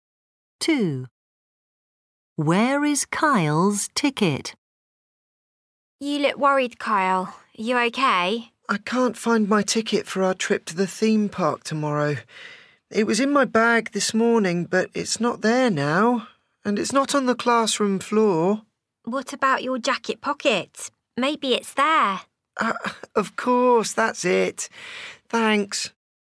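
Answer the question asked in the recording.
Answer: in his jacket pocket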